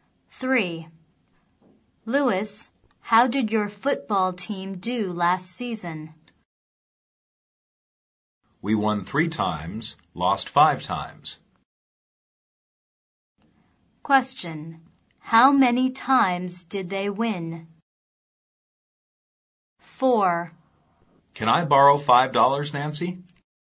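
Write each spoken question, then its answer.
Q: How many times did they win?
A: 3 times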